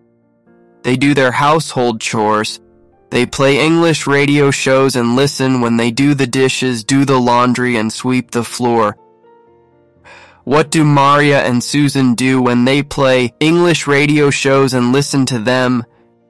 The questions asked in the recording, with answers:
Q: What do Maria and Susan do when they play English radio shows and listen to them?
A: They do the dishes, do the laundry, and sweep the floor.